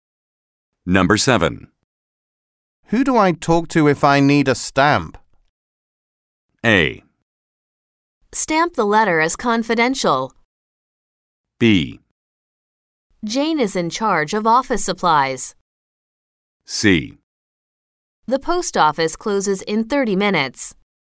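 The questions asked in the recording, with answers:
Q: Who do I talk to if I need a stamp?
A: B: Jane is in charge of office supplies.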